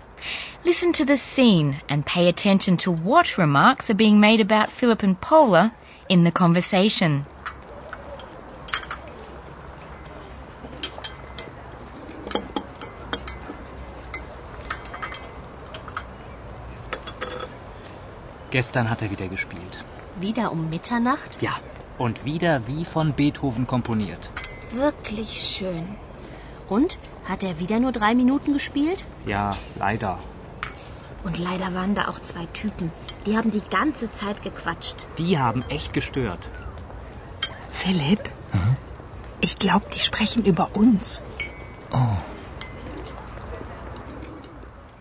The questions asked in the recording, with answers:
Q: Listen to the scene and pay attention to what remarks are being made about Philip and Paula in the conversation.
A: The female student complains that 2 Typen, a slang word for people, had talked gequatscht, another slang word, the whole time.